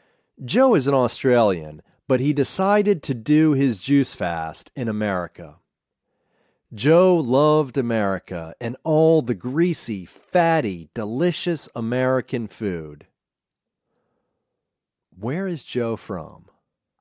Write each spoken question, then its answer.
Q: Where is Joe from?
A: Joe is an Australian.